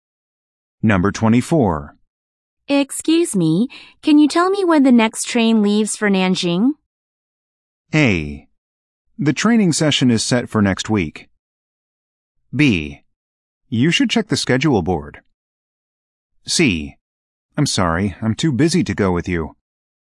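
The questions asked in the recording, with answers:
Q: Excuse me, can you tell me when the next train leaves for Nanjing?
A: B: You should check the schedule board.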